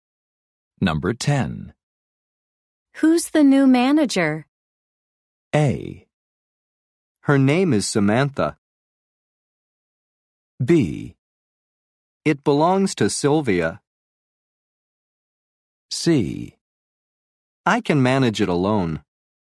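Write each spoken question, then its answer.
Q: Who's the new manager?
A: A: Her name is Samantha.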